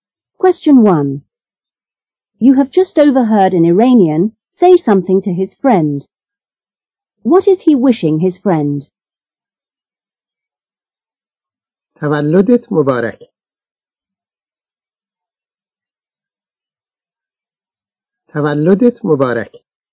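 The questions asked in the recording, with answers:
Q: What is he wishing his friend?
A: Happy birthday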